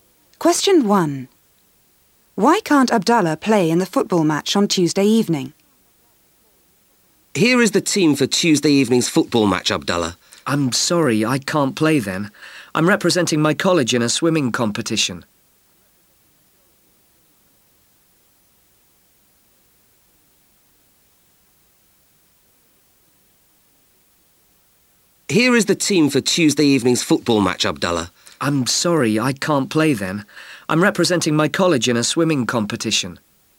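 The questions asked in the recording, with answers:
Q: Why can't Abdallah play in the football match on Tuesday evening?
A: He's representing his college in a swimming competition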